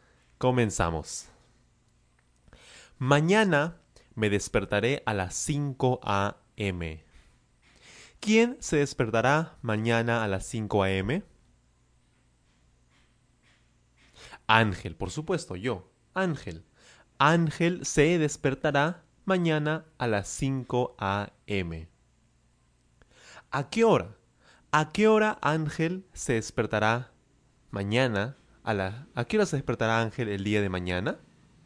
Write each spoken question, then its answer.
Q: ¿A, qué hora se despertará Ángel el día de mañana?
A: Claro, a las 5 a.m., a las 5 de la mañana.